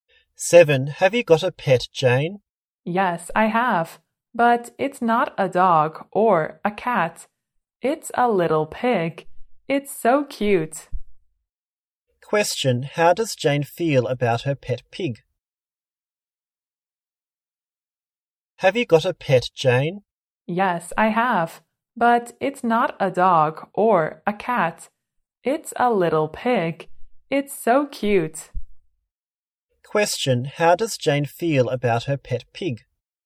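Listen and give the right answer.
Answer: It's cute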